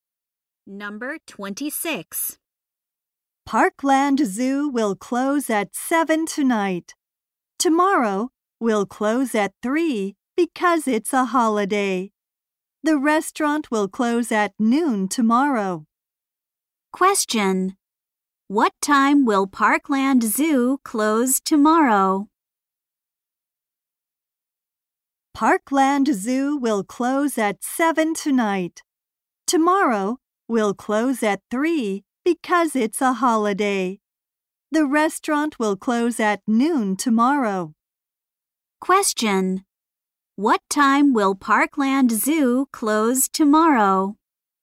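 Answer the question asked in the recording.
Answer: At 3.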